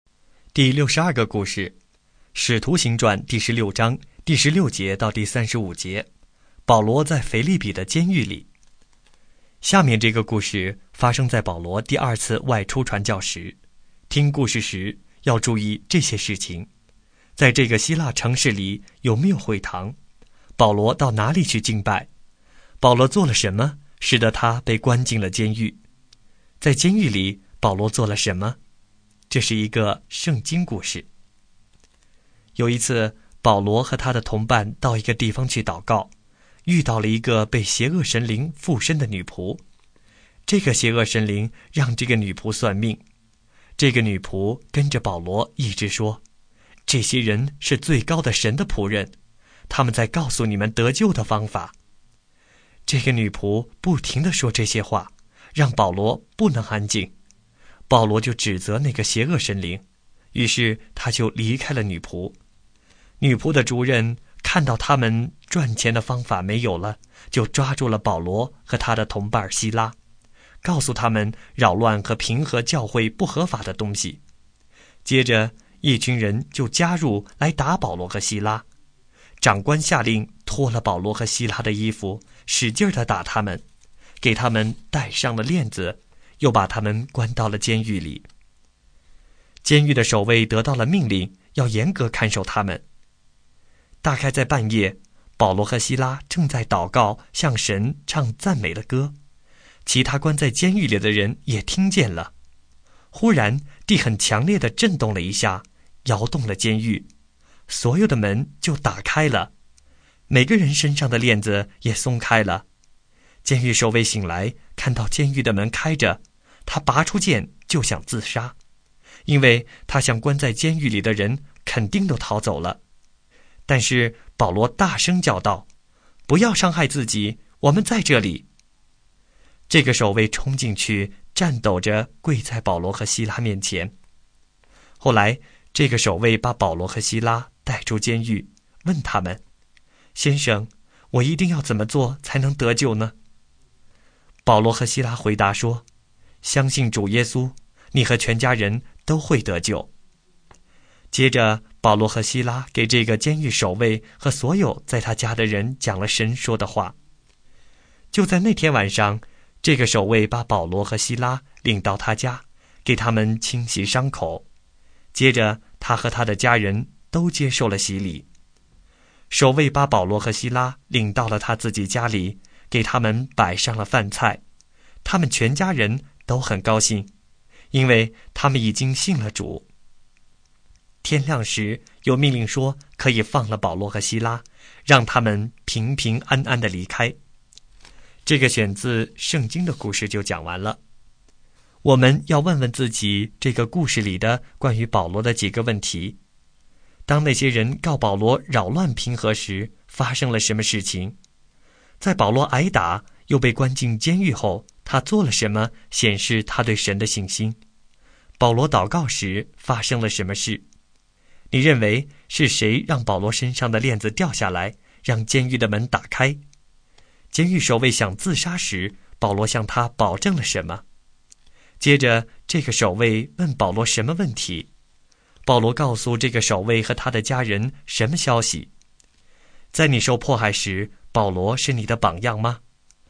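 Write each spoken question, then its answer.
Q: 当那些人告保罗扰乱平和时,发生了什么事情?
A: 一群人打保罗和希拉,长官下令脱衣打他们,戴上链子,关进监狱

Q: 在保罗挨打又被关进监狱后,他做了什么显示他对神的信心?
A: 半夜祷告,向神唱赞美的歌

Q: 保罗祷告时发生了什么事?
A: 发生强烈地震,监狱的门都打开,链子都松开了

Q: 监狱守卫想自杀时,保罗向他保证了什么?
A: 不要伤害自己,我们都在这里

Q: 接着这个守卫问保罗什么问题?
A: 我一定要怎么做才能得救?

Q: 保罗告诉这个守卫和他的家人什么消息?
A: 相信主耶稣,你和全家都会得救;给他们讲了神说的话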